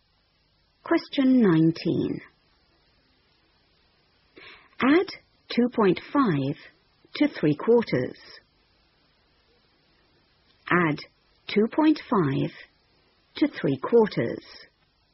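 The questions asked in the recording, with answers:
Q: Add 2.5 to 3/4.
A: 3.25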